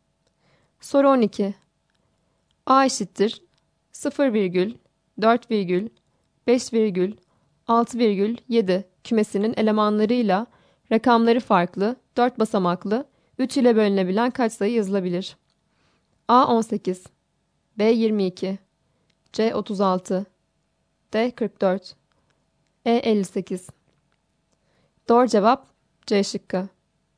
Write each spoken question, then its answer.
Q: A eşittir 0 virgül 4 virgül 5 virgül 6 virgül 7 kümesinin elemanlarıyla rakamları farklı 4 basamaklı 3 ile bölünebilen kaç sayı yazılabilir?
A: Doğru cevap C şıkkı.